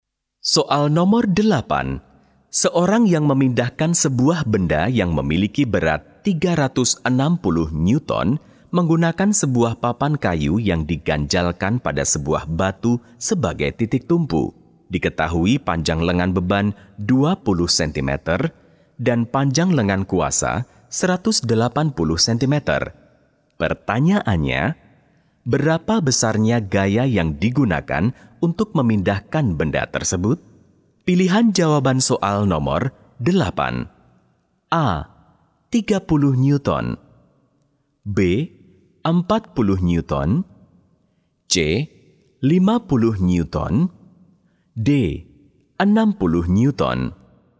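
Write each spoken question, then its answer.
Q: Pertanyaannya, berapa besarnya gaya yang digunakan untuk memindahkan benda tersebut?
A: B: 40 Newton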